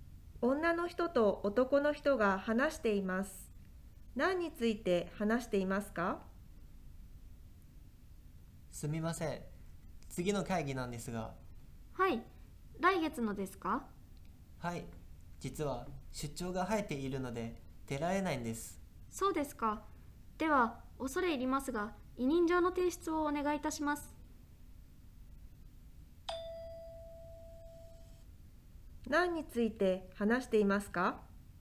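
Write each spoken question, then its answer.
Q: 何について話していますか?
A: 来月の会議に出られないこと(出張のため、委任状を出す)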